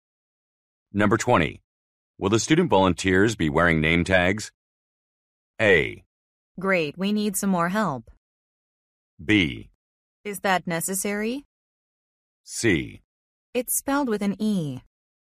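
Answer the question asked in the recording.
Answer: B: Is that necessary?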